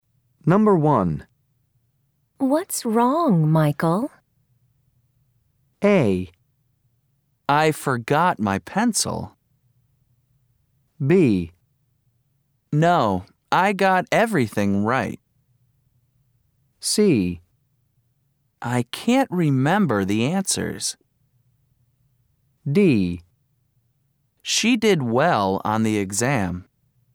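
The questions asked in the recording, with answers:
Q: What's wrong, Michael?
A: A: I forgot my pencil.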